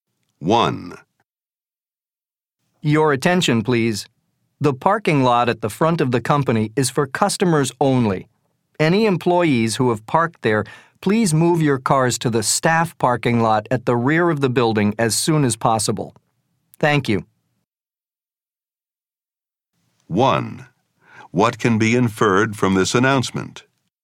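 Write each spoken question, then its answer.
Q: What can be inferred from this announcement?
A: Some employees have parked in the customer parking lot and need to move their cars to the staff lot.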